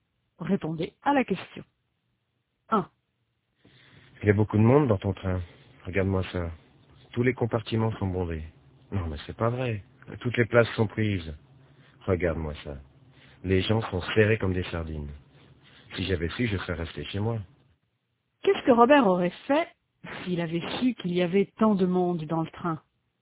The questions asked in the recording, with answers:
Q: Qu'est-ce que Robert aurait fait s'il avait su qu'il y avait tant de monde dans le train?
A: Il serait resté chez lui.